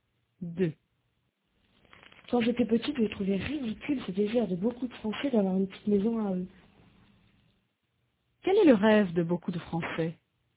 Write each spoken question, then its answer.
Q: Quel est le rêve de beaucoup de Français ?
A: D'avoir une petite maison à eux.